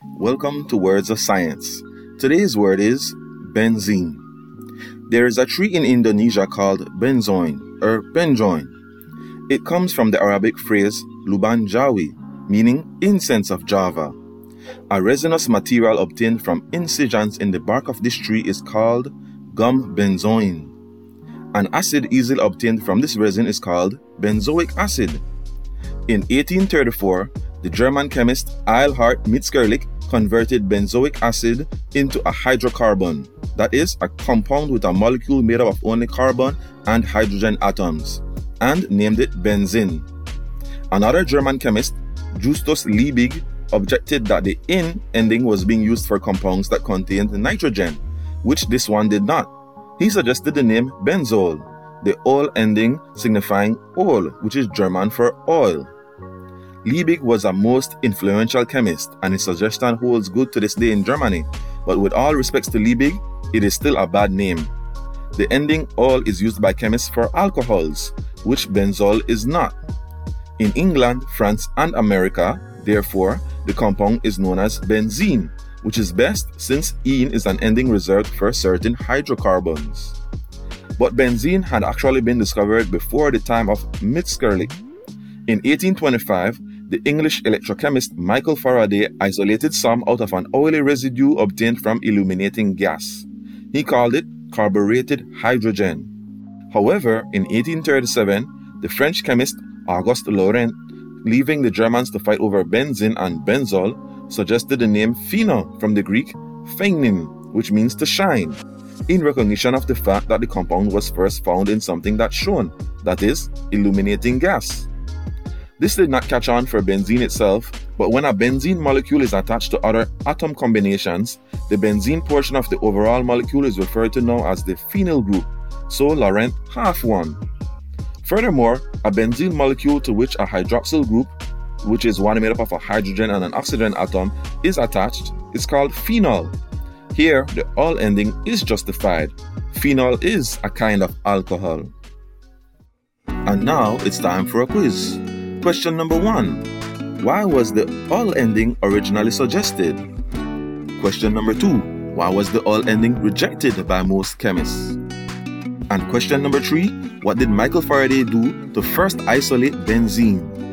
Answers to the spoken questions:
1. because ol is German for oil.
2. because ol is usually reserved for alcohols.
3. Michael Faraday illuminated gas